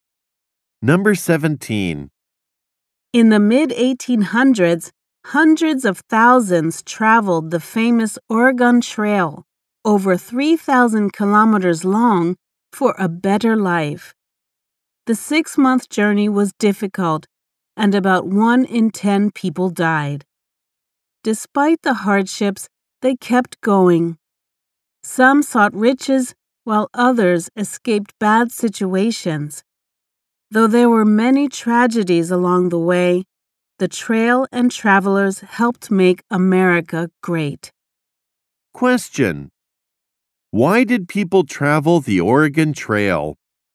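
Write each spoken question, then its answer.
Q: Why did people travel the Oregon Trail?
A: For a better life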